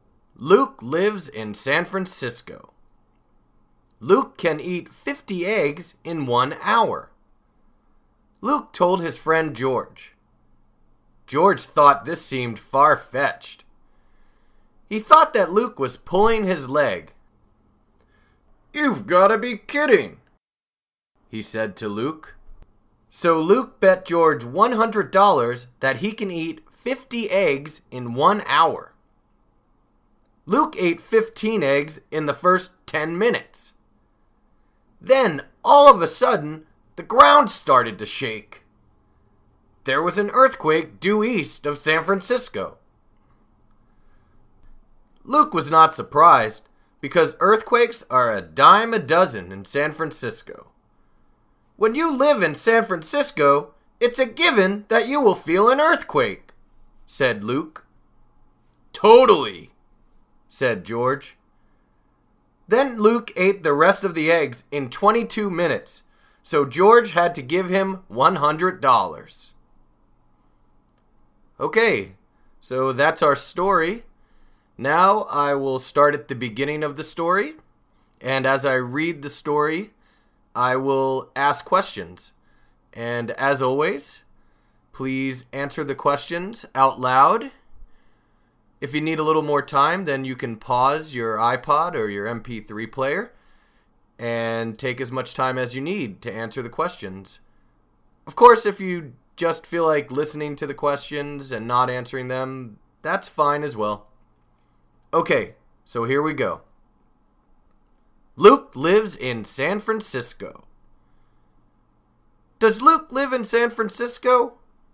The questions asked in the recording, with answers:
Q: Does Luke live in San Francisco?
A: Yes, he does. Luke lives in San Francisco.